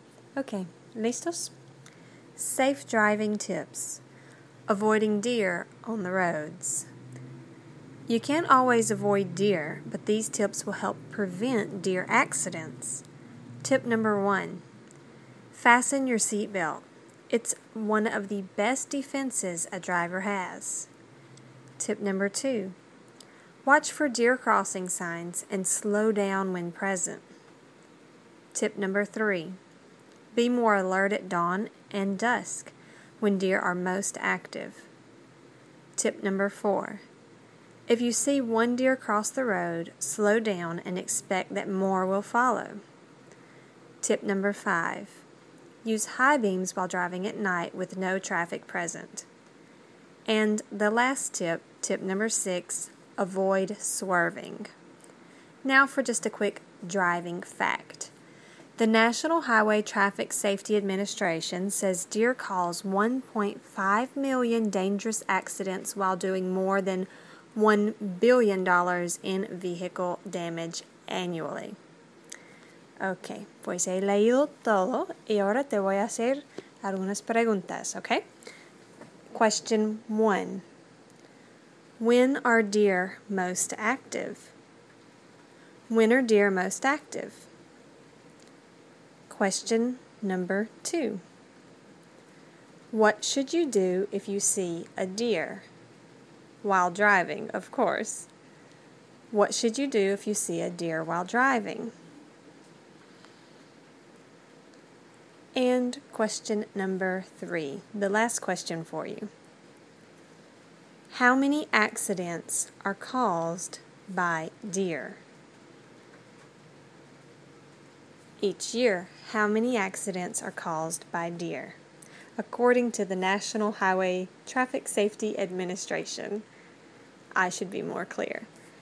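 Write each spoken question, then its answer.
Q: When are deer most active?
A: At dawn and dusk

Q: What should you do if you see a deer?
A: Slow down and expect that more will follow

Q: How many accidents are caused by deer?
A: 1.5 million each year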